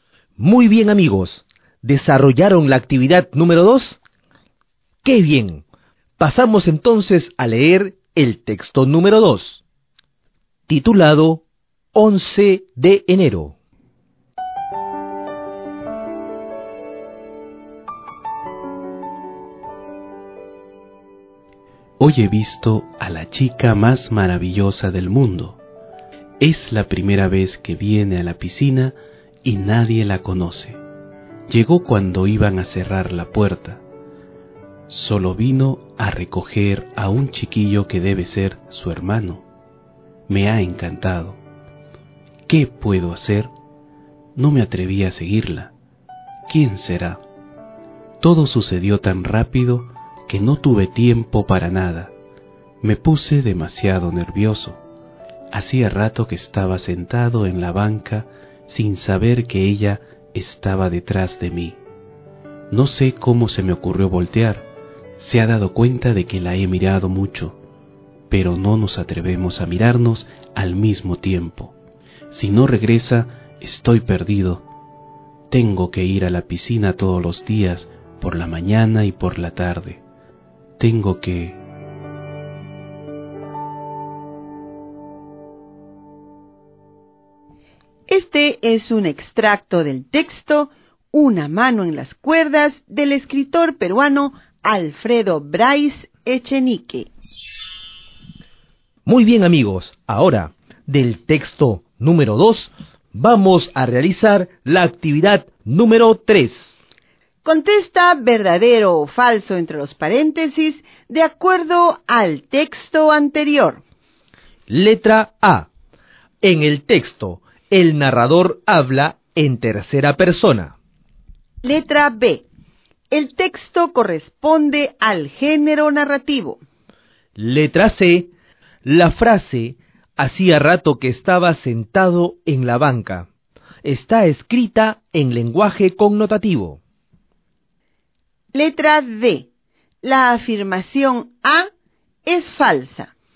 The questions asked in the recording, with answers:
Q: En el texto, el narrador habla en tercera persona.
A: Y en el texto número 2, el narrador ha escrito el texto en primera persona.

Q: El texto corresponde al género narrativo.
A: en ambos casos el género literario es el género narrativo.